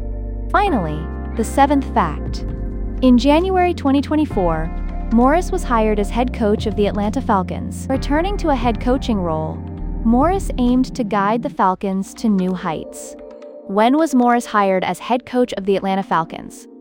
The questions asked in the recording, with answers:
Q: When was Morris hired as head coach of the Atlanta Falcons?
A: Correct answer, January 2024.